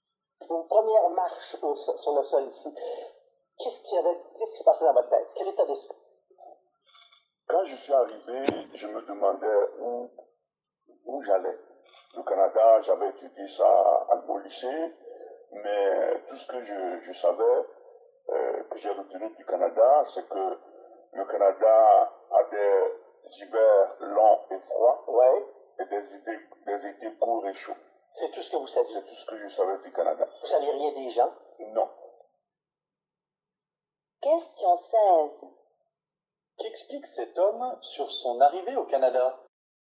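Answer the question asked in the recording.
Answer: Il ne savait presque rien du Canada, seulement que les hivers sont longs et froids et les étés courts et chauds.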